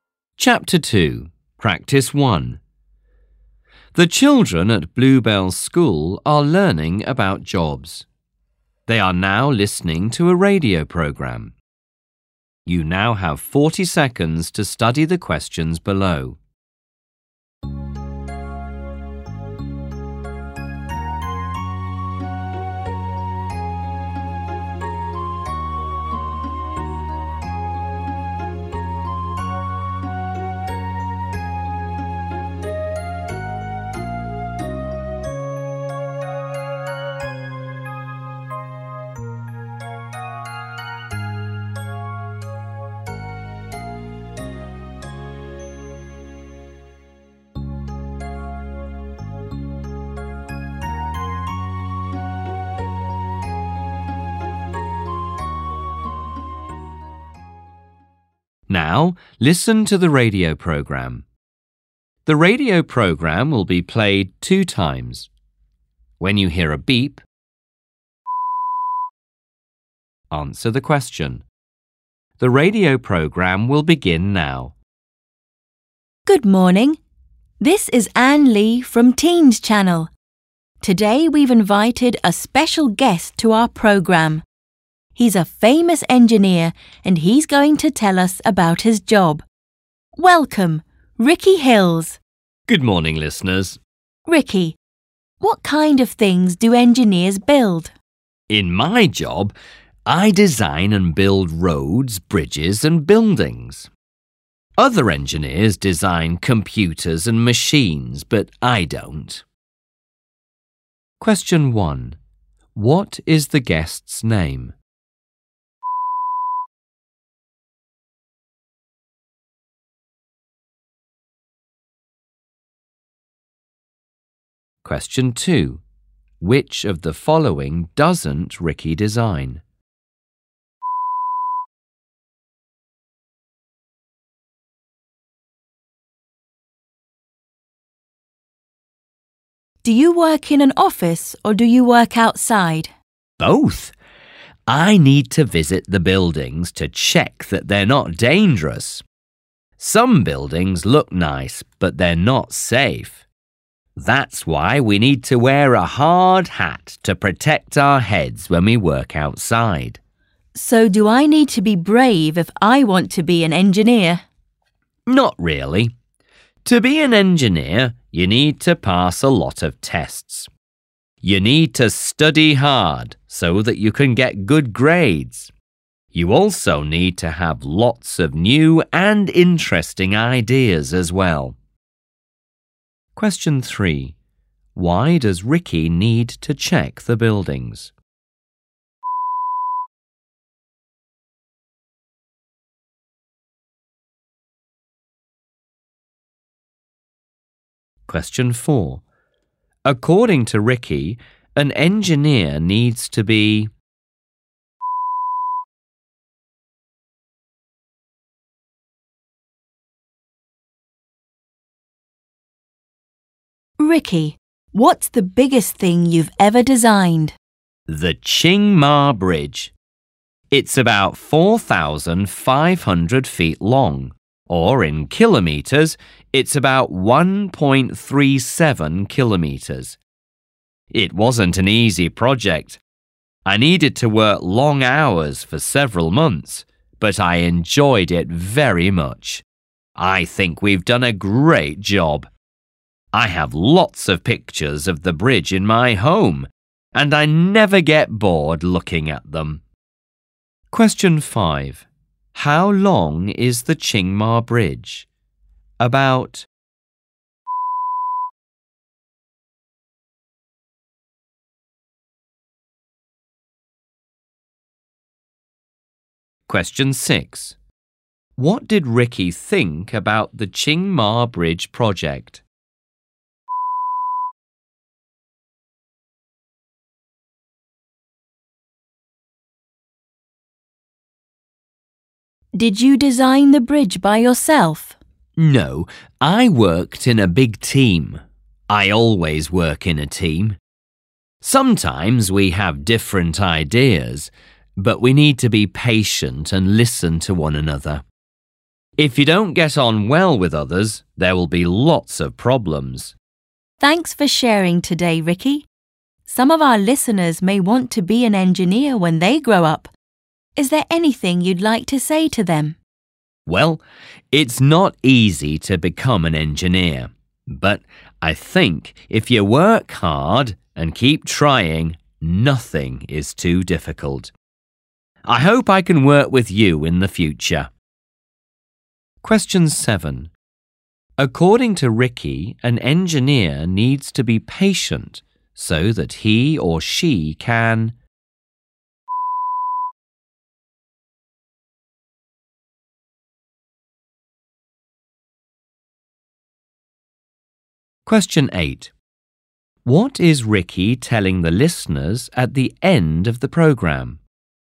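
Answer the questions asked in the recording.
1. Ricky Hills
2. Computers and machines
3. To check that they're not dangerous
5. About 4,500 feet (1.37 kilometres)
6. It wasn't easy, but he enjoyed it very much
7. listen to one another in the team
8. If you work hard and keep trying, nothing is too difficult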